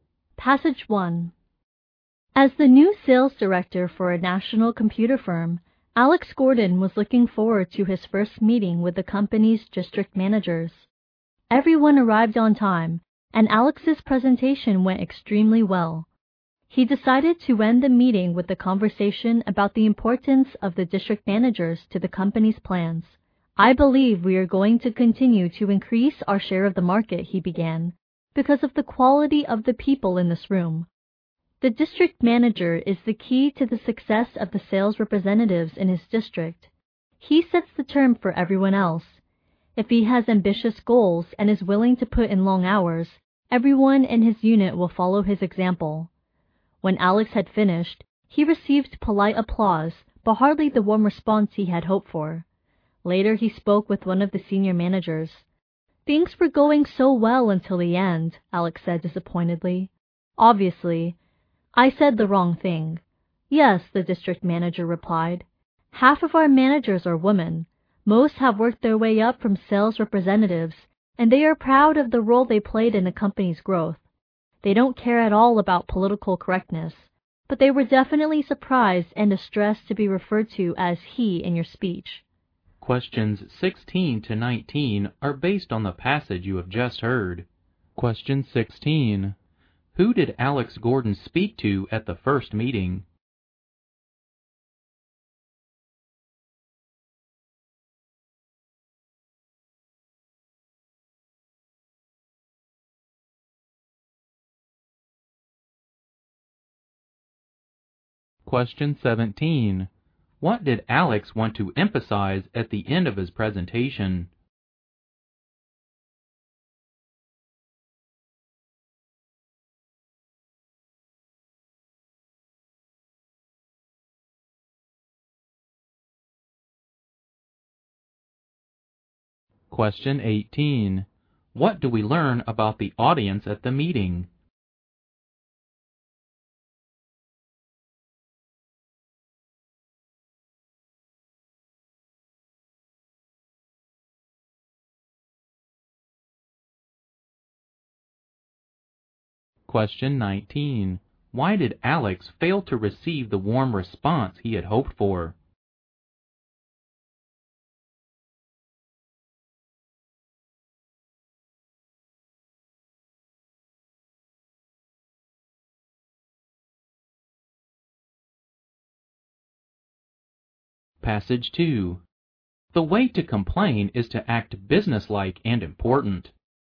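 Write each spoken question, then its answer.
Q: Who did Alex Gordon speak to at the first meeting?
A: The company's district managers.

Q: What did Alex want to emphasize at the end of his presentation?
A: How important the district managers are to the company's plans.

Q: What do we learn about the audience at the meeting?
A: Half of them were women.

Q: Why did Alex fail to receive the warm response he had hoped for?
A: He referred to the managers as "he", which upset the women.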